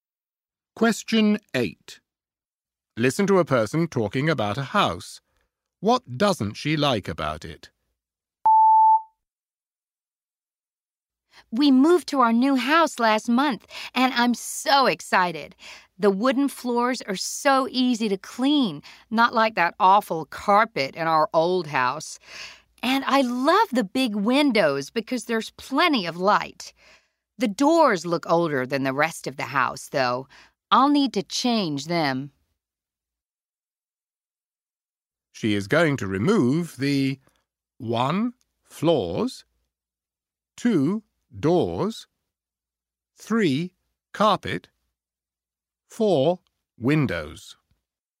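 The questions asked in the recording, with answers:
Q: What doesn't she like about it?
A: 2: Doors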